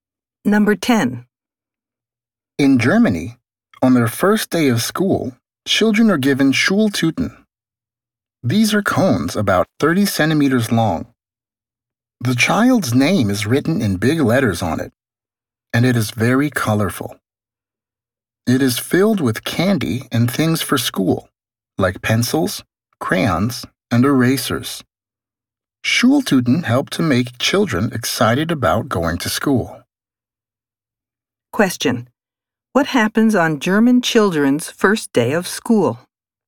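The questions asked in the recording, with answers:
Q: What happens on German children's first day of school?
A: They are given Schultüten, colorful cones filled with candy and school things.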